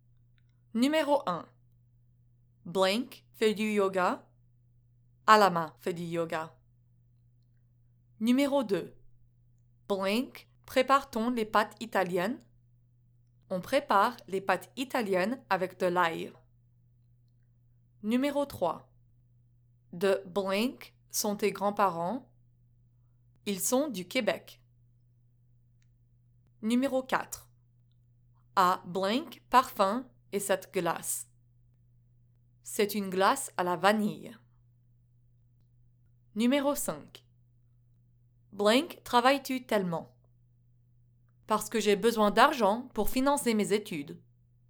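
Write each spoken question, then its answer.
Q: Blank prépare-t-on les pâtes italiennes?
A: Comment

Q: De blank sont tes grands-parents?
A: où (D'où)

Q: À blank parfum et cette glace.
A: quel

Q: Blank, travailles-tu tellement?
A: Pourquoi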